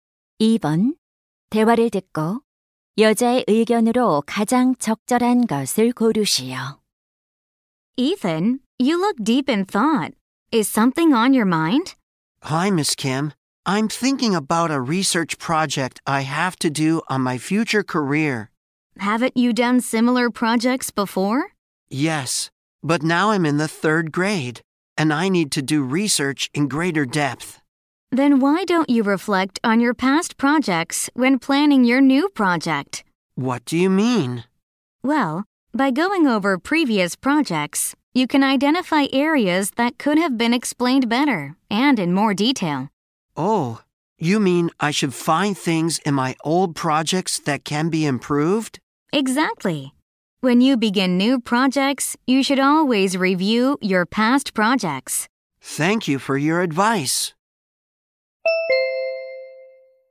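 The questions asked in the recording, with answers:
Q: 대화를 듣고 여자의 의견으로 가장 적절한 것을 고르시오.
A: 새 프로젝트를 시작할 때 과거 프로젝트를 검토해야 한다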